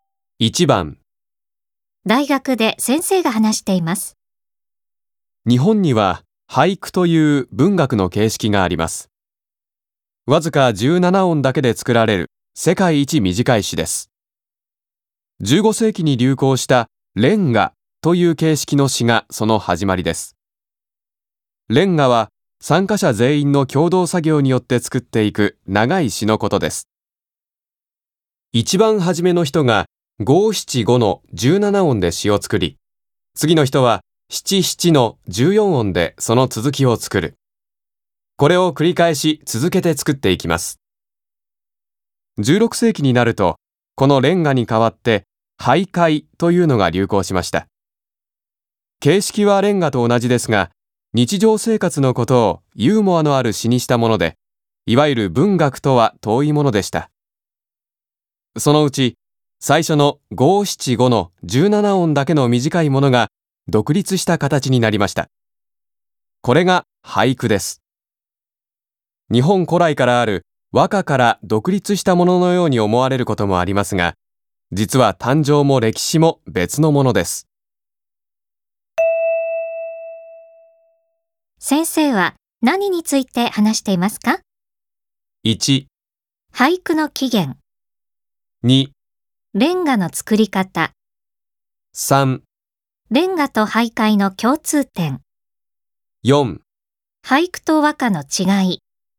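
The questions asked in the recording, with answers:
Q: 先生は何について話していますか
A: 1: 俳句の起源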